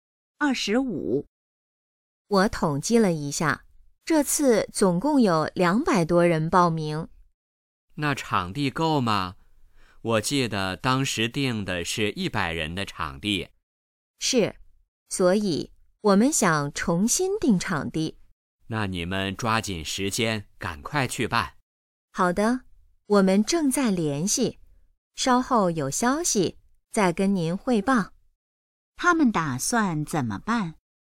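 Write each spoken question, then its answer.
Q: 他们打算怎么办?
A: 重新定场地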